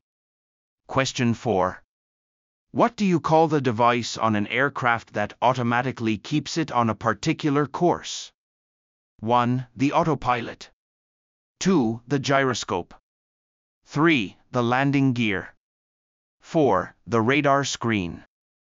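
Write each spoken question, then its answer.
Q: What do you call the device on an aircraft that automatically keeps it on a particular course?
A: 1: The autopilot.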